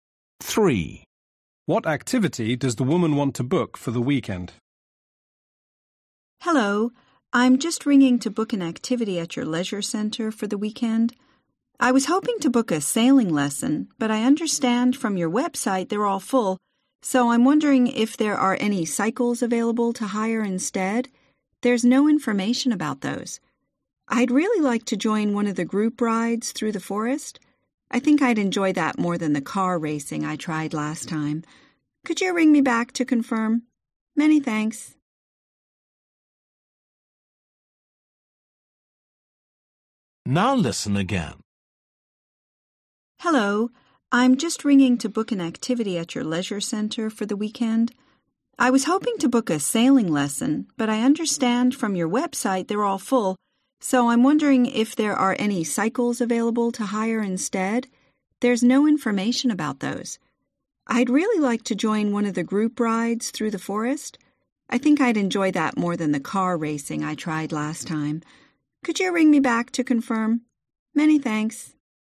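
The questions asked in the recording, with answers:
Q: What activity does the woman want to book for the weekend?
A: cycling (a group bike ride)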